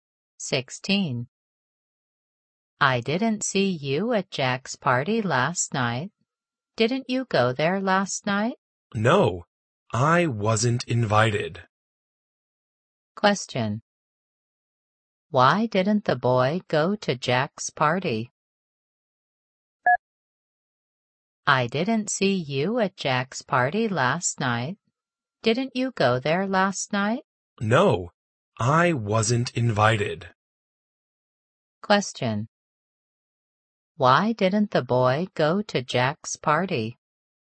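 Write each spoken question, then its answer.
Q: Why didn't the boy go to Jack's party?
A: He wasn't invited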